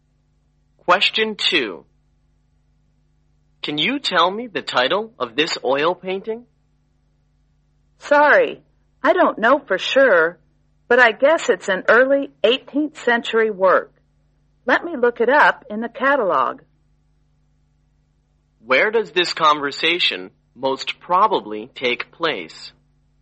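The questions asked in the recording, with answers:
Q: Where does this conversation most probably take place?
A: In an art gallery or museum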